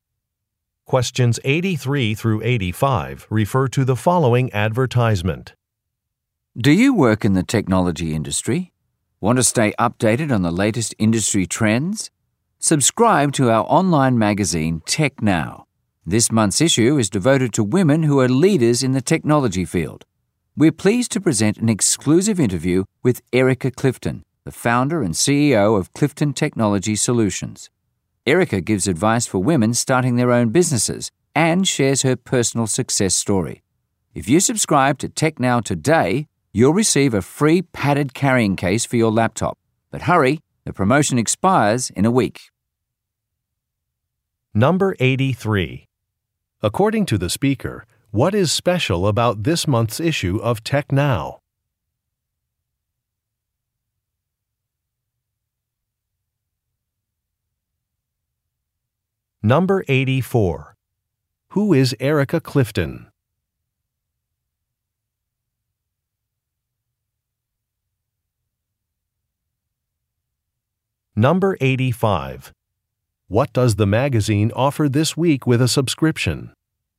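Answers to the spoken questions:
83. It is devoted to women who are leaders in the technology field
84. The founder and CEO of Clifton Technology Solutions
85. A free padded laptop carrying case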